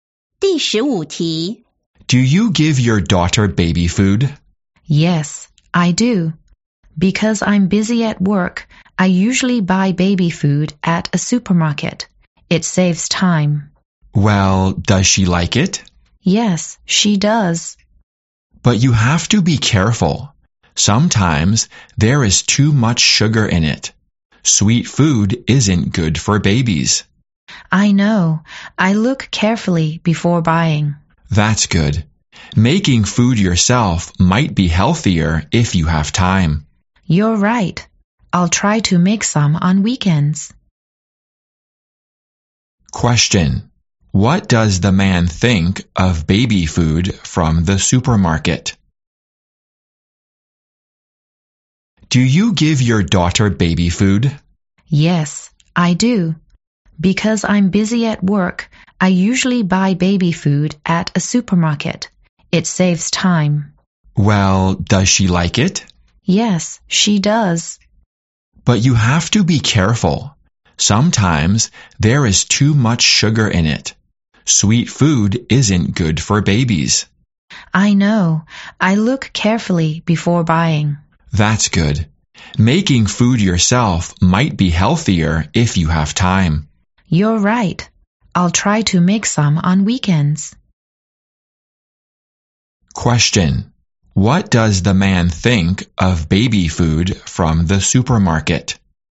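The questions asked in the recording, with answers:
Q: What does the man think of baby food from the supermarket?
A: You have to be careful; it may have too much sugar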